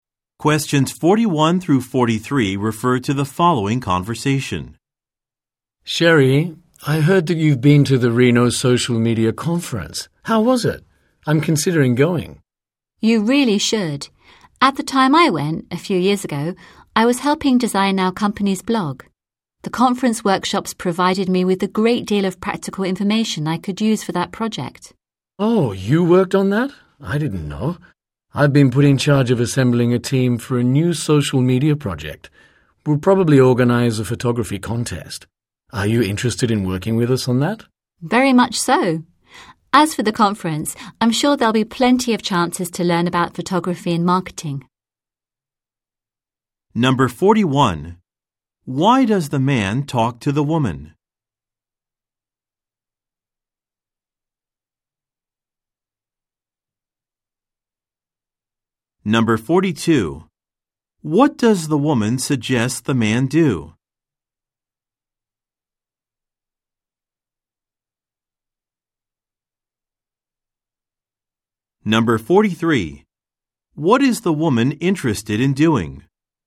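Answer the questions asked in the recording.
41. To ask her about the Reno Social Media Conference she attended
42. Go to the conference
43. Working on the man's new social media project (a photography contest)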